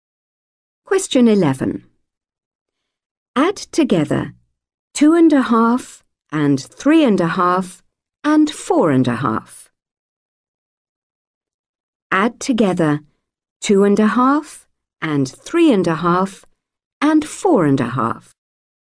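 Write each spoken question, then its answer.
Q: Add together 2.5 and 3.5 and 4.5.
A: 10.5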